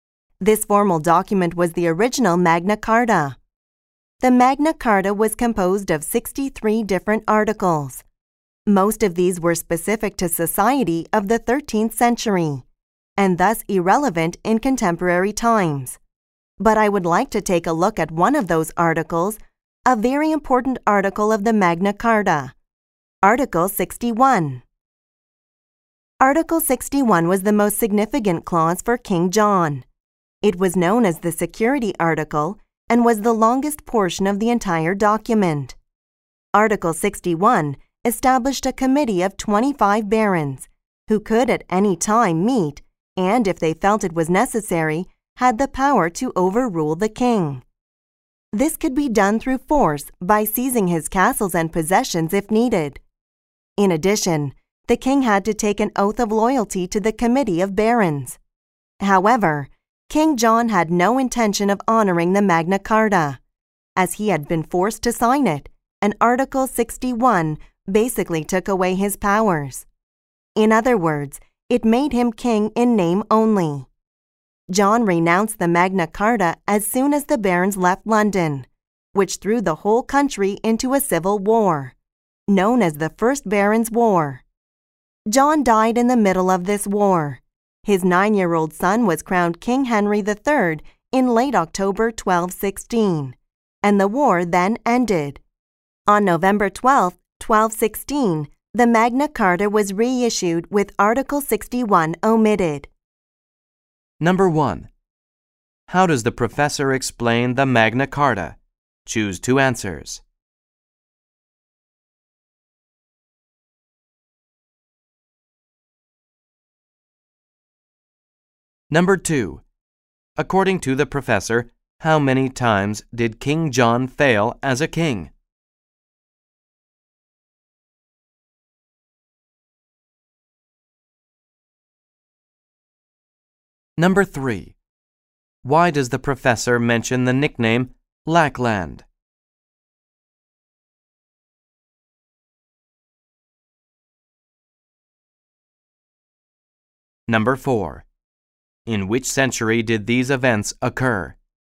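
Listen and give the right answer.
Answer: The 13th century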